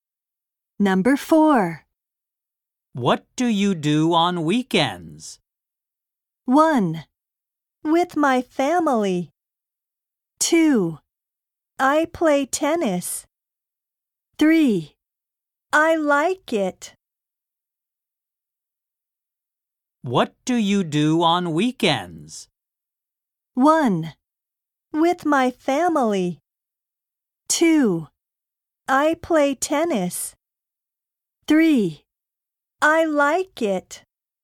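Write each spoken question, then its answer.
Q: What do you do on weekends?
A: 2: I play tennis.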